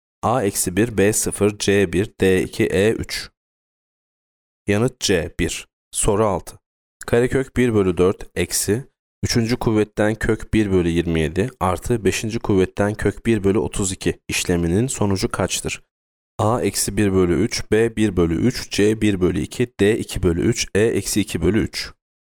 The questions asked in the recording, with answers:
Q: kuvvetten kök 1 bölü 32 işleminin sonucu kaçtır?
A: Yanıt D2 bölü 3.